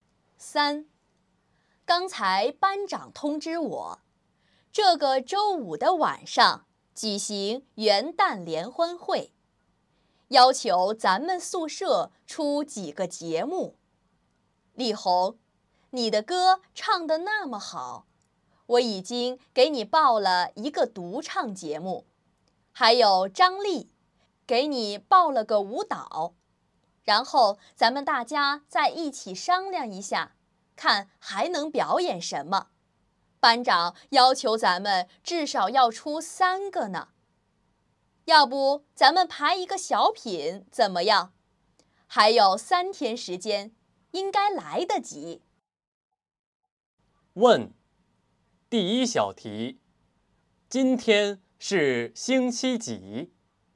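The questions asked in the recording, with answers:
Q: 今天 是星期几?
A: 星期二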